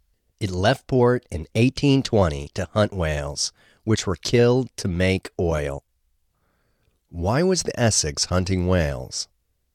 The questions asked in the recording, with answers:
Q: Why was the Essex hunting whales?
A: The Essex was hunting whales to make oil.